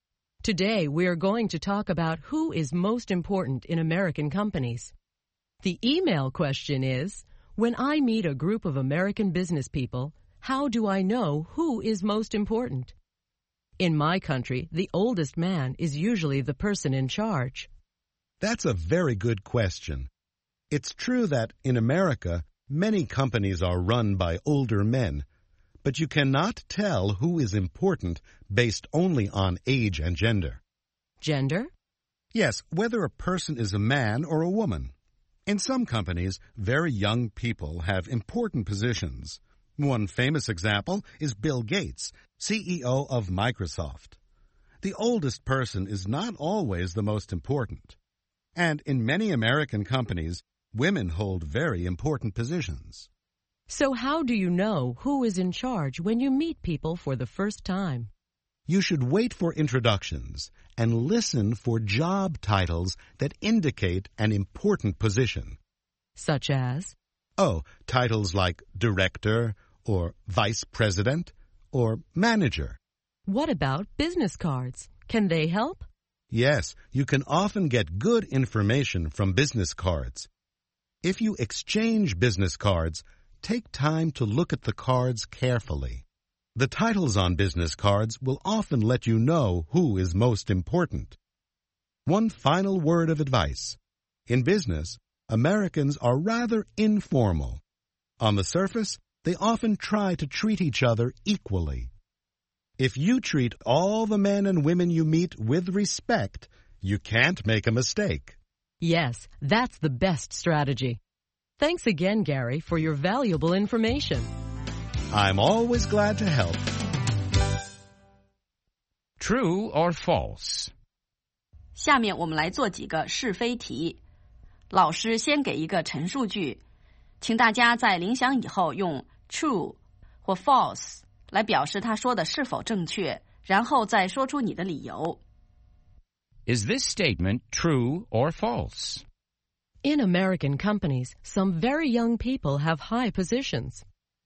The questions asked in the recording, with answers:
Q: In American companies, some very young people have high positions.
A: True. Young people sometimes have high positions in American companies.